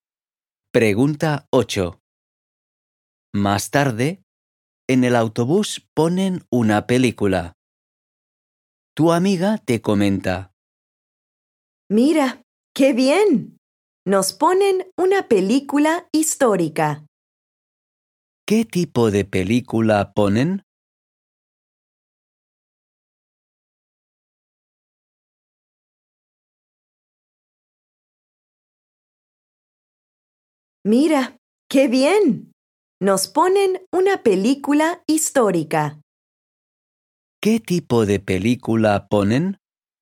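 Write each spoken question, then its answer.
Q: ¿Qué tipo de película ponen?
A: Una película histórica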